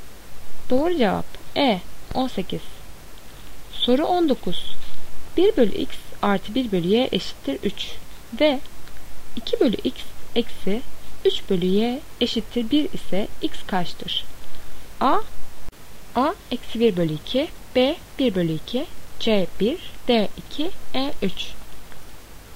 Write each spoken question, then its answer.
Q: 1 bölü X artı 1 bölü Y eşittir 3 ve 2 bölü X eksi 3 bölü Y eşittir 1 ise X kaçtır?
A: Doğru cevap B 1 bölü 2.